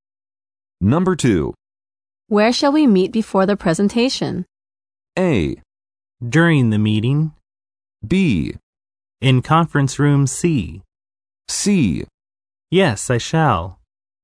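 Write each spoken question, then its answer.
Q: Where shall we meet before the presentation?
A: B: In conference room C.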